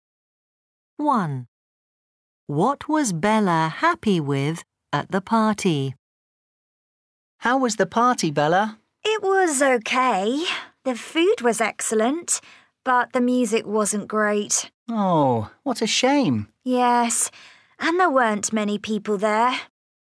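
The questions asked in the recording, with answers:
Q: What was Bella happy with at the party?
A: the food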